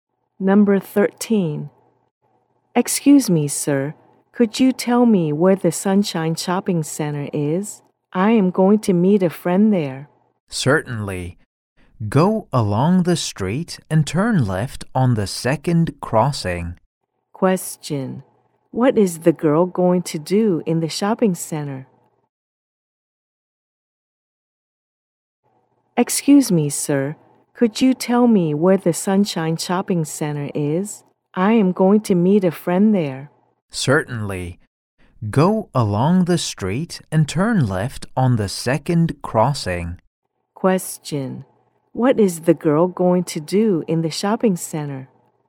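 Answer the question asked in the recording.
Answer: Meet a friend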